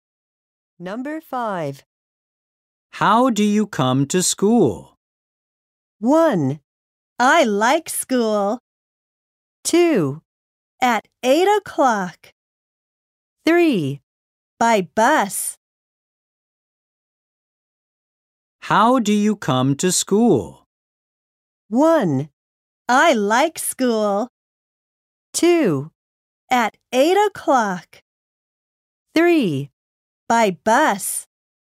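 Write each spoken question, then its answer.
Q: How do you come to school?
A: 3: By bus.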